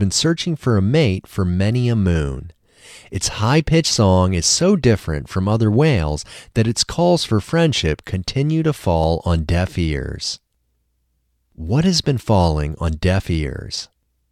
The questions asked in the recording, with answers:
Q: What has been falling on deaf ears?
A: The whale's calls for friendship have been falling on deaf ears.